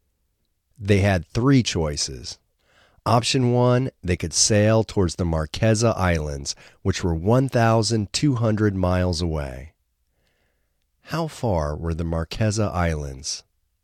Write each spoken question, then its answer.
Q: How far were the Marquesa Islands?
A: The Marquesa Islands were 1,200 miles away.